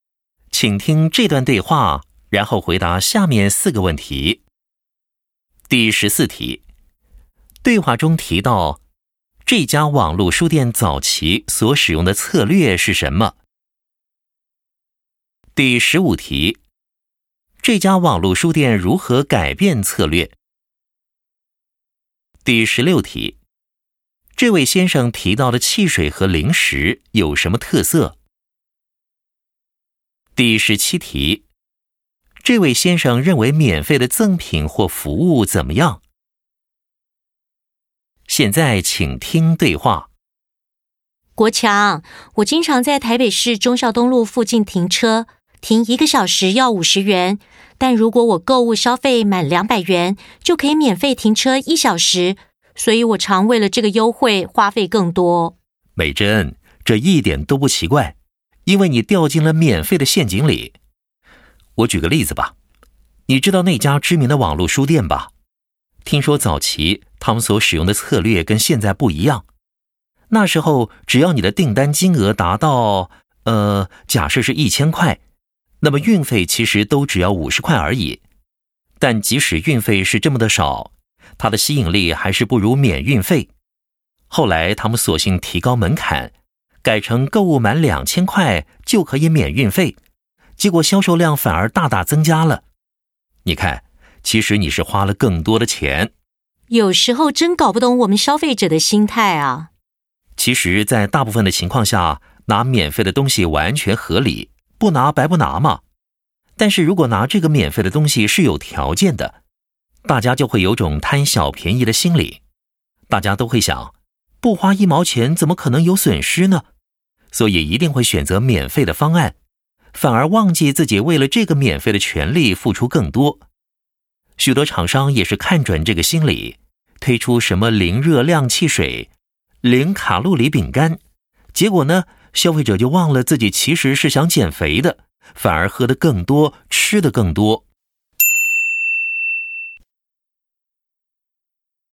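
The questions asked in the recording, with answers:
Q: 对话中提到,这家网络书店早期所使用的策略是什么?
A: 订单金额达到1000块,运费只要50块

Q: 这家网络书店如何改变策略?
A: 提高门槛,购物满2000块就免运费

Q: 这位先生提到的汽水和零食有什么特色?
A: 零热量、零卡路里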